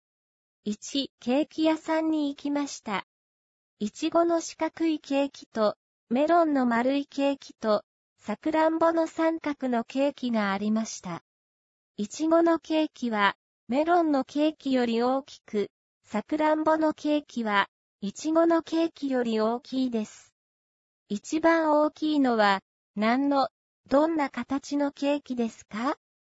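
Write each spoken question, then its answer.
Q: 一番大きいのは、何の、どんな形のケーキですか?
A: さくらんぼの三角のケーキ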